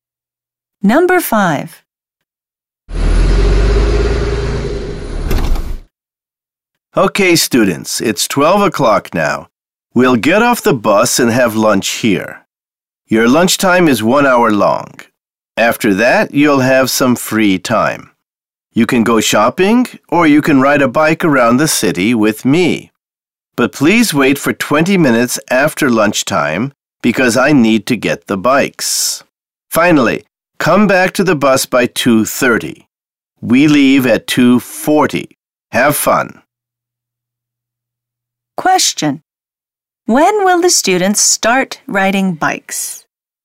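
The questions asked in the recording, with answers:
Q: When will the students start riding bikes?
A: At 1:20.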